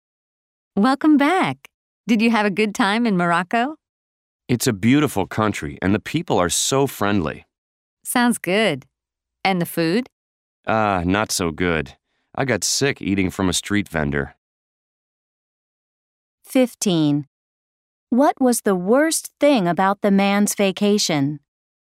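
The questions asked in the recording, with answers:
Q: What was the worst thing about the man's vacation?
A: The food; he got sick eating from a street vendor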